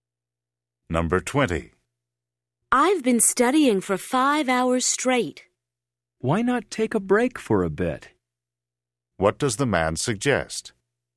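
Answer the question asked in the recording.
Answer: Taking a break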